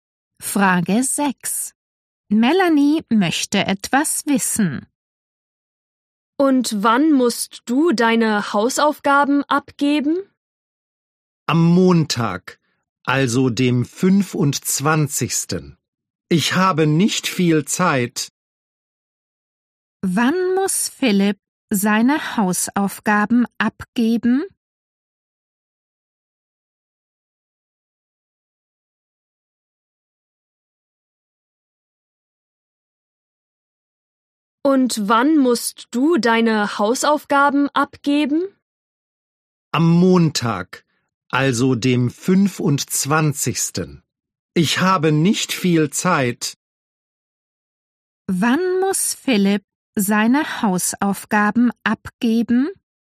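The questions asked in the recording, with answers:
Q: Wann muss Philipp seine Hausaufgaben abgeben?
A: Am Montag, dem 25.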